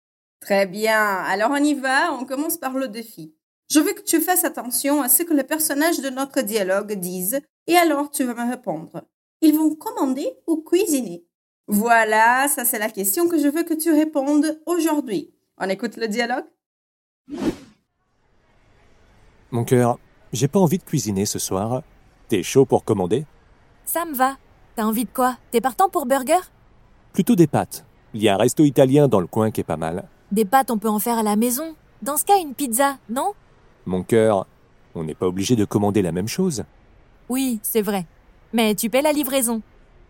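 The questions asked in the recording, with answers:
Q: Ils vont commander ou cuisiner?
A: Commander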